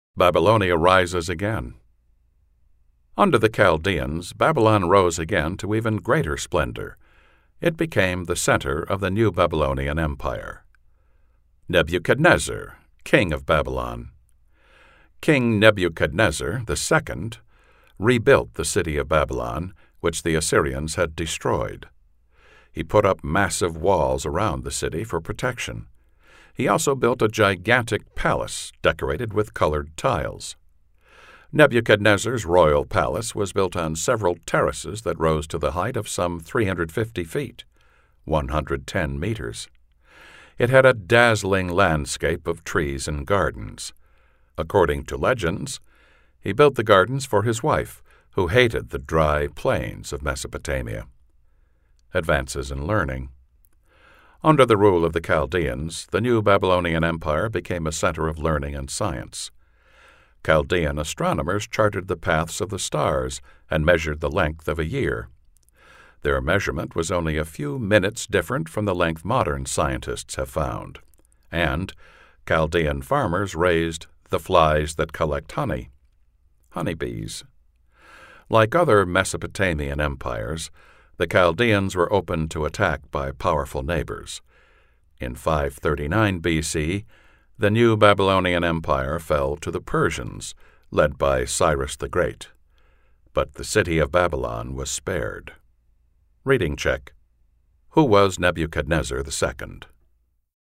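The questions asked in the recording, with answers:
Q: Who was Nebuchadnezzar II?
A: The Chaldean king of Babylon who rebuilt the city, with massive walls and a huge palace with gardens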